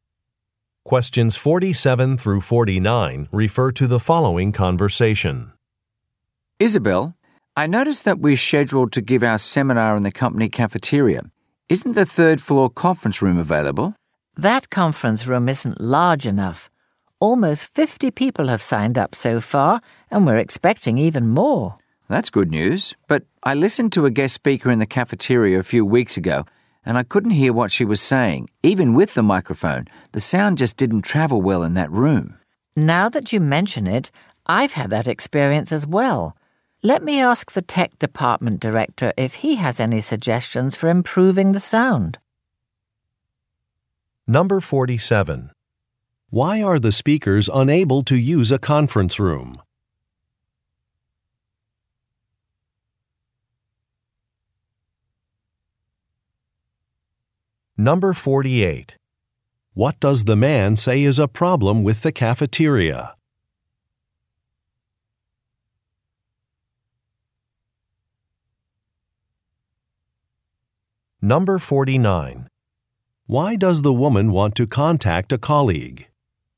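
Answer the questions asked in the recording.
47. It isn't large enough
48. Sound doesn't travel well; hard to hear
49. To get suggestions for improving the sound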